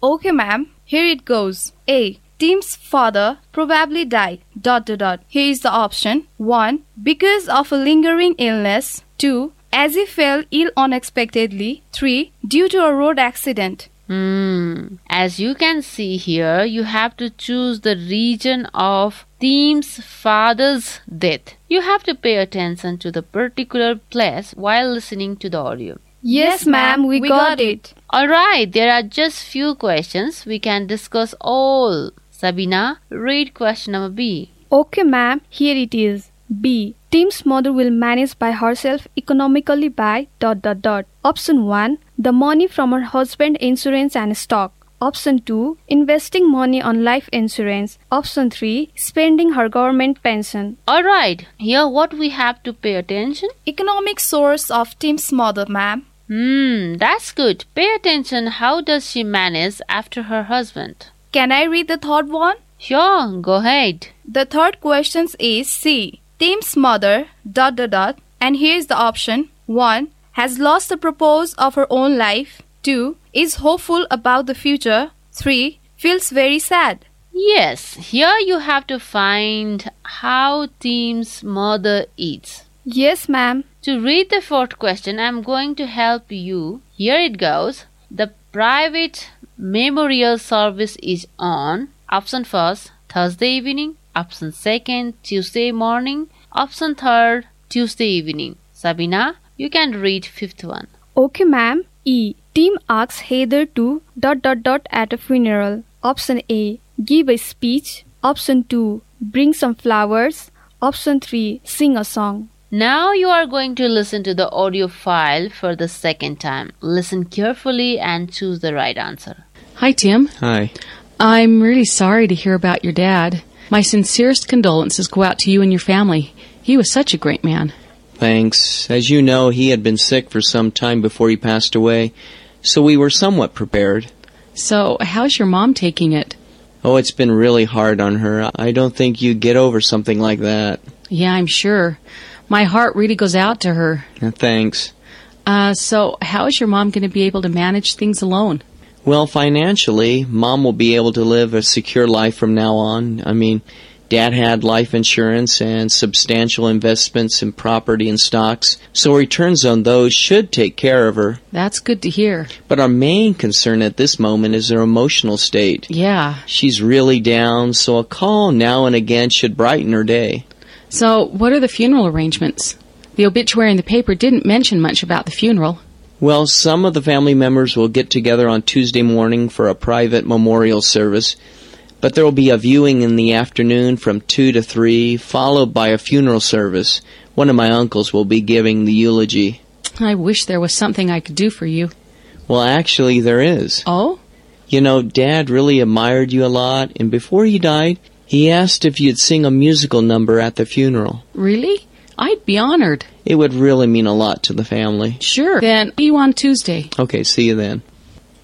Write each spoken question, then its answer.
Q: Tim's father probably died.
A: The right answer is, Tim's father probably died, option 1, because of a lingering illness.

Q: Tim's mother will manage by herself economically by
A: The right answer is, Tim's mother will manage by herself economically by option 1, the money from her husband's insurance and stock.

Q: Tim's mother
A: The right answer of third question is option 3, feels very sad.

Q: The private memorial service is on.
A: The answer is option 2, that is Tuesday morning.

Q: Tim asks Heather to at a funeral.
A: Tim asks Heather to sing a song at a funeral.